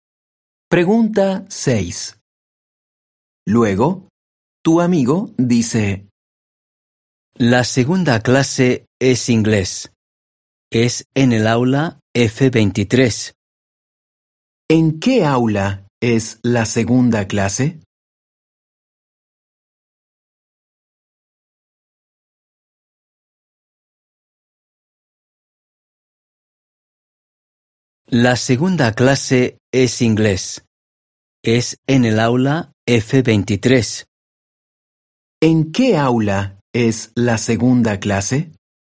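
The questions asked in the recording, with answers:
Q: ¿En qué aula es la segunda clase?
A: En el aula F23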